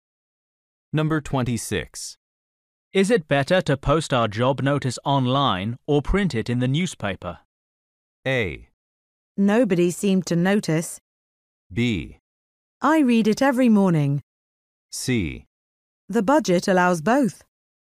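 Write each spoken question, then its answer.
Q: Is it better to post our job notice online or print it in the newspaper?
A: C: The budget allows both.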